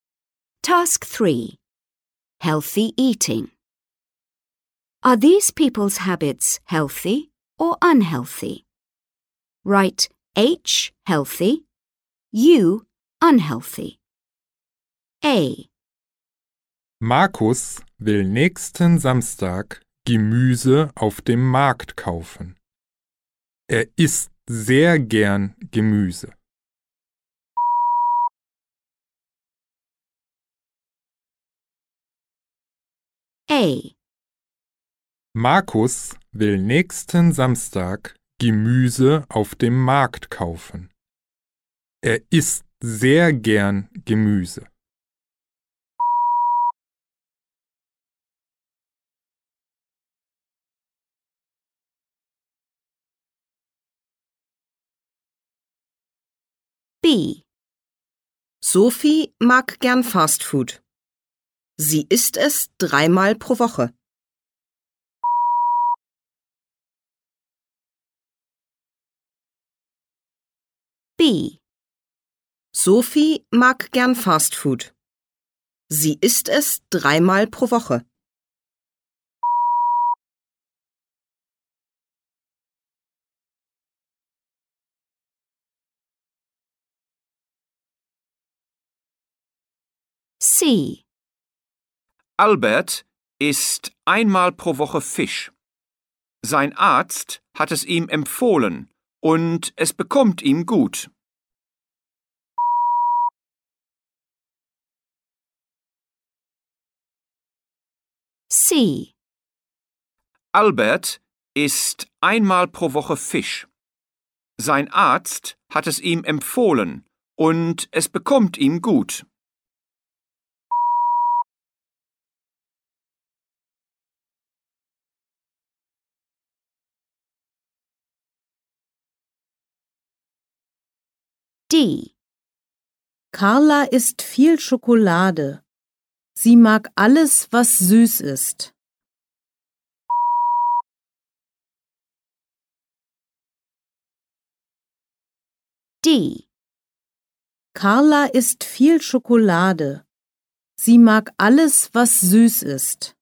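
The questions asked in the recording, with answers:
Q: Are these people's habits healthy or unhealthy?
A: H: healthy

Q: Are these people's habits healthy or unhealthy?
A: U: unhealthy

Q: Are these people's habits healthy or unhealthy?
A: H: healthy

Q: Are these people's habits healthy or unhealthy?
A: U: unhealthy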